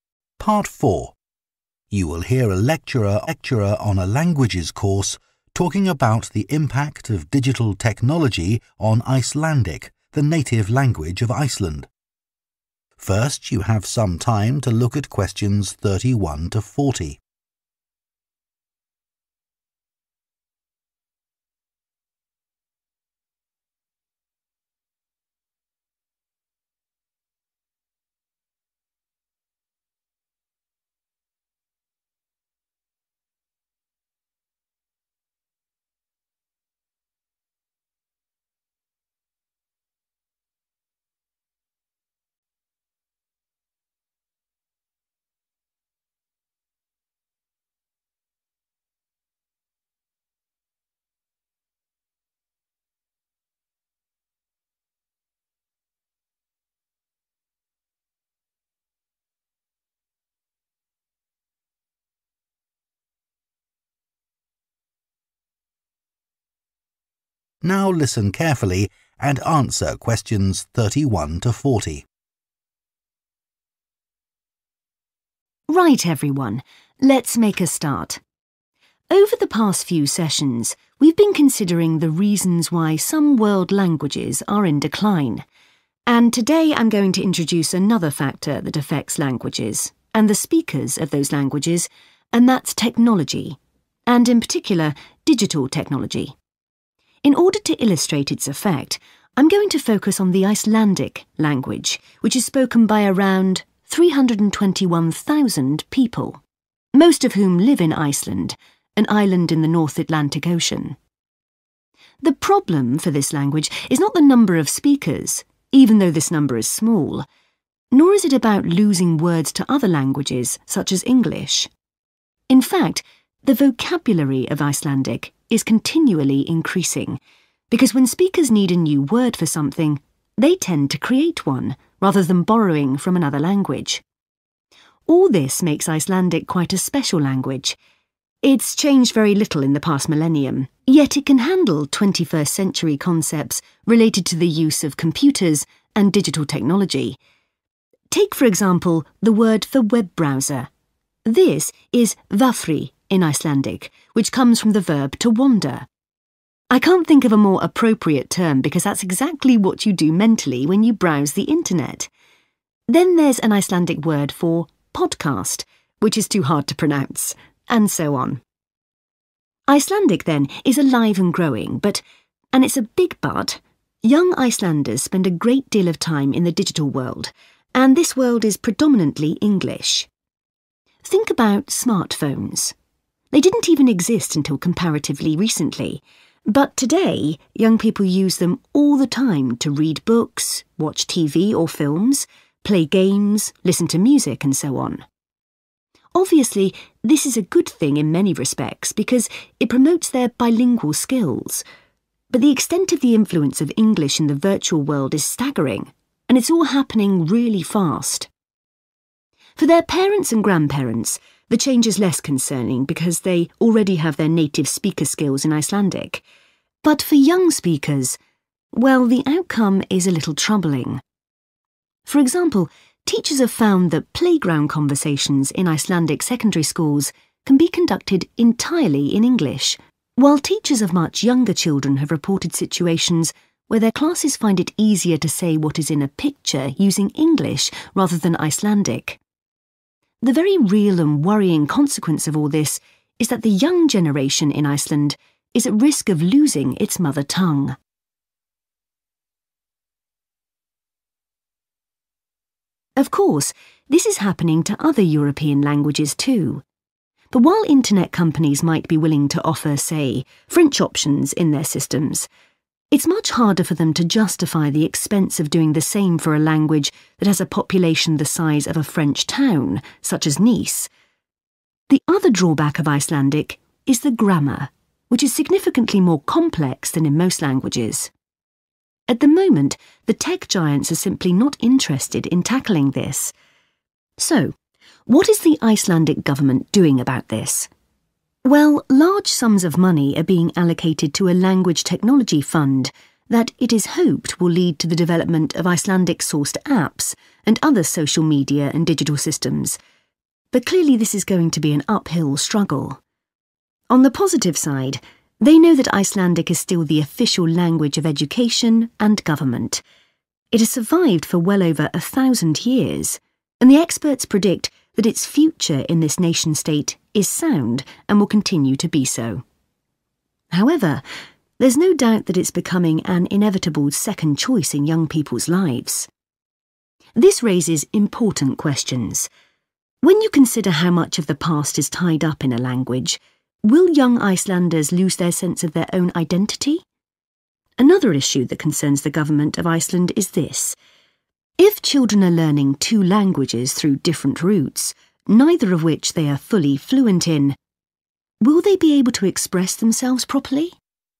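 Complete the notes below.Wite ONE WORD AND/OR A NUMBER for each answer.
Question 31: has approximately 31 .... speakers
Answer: 321,000

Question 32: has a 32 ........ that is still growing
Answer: vocabulary

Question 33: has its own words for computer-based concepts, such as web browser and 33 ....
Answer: podcast

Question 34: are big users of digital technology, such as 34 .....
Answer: smartphones

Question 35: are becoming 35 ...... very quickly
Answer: bilingual

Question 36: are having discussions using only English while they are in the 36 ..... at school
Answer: playground

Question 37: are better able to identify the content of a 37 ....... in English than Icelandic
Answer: picture

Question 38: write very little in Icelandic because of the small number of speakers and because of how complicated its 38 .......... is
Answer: grammar

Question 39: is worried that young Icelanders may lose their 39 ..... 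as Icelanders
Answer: identity

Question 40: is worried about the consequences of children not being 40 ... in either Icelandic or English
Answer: fluent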